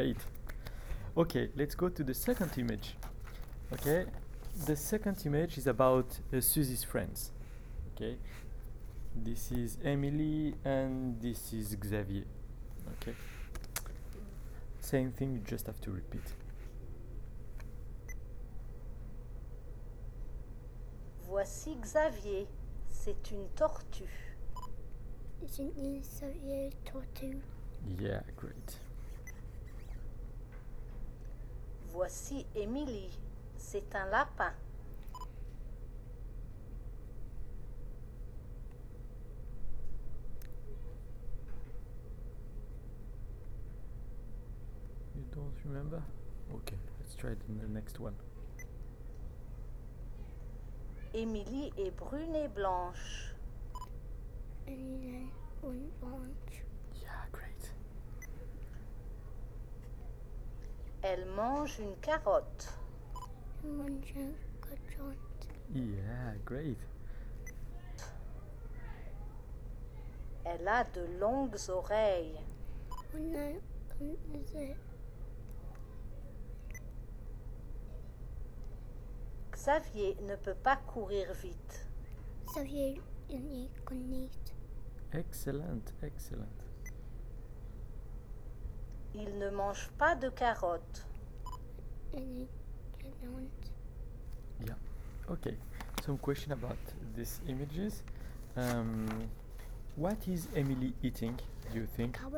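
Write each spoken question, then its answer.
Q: What is Emily eating, do you think?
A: A carrot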